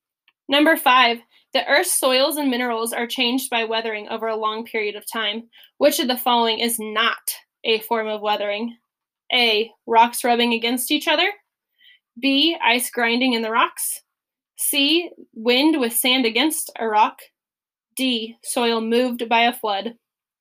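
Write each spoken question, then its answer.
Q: Which of the following is not a form of weathering?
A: D: soil moved by a flood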